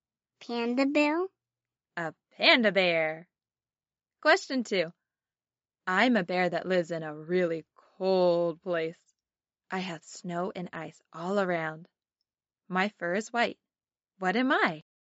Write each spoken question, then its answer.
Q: What am I?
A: I'm a polar bear.